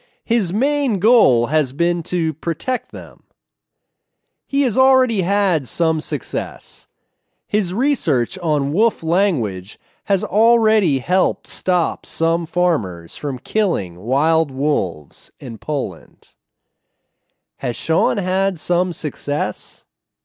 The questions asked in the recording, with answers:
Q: Has Sean had some success?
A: Yes, he has had some success.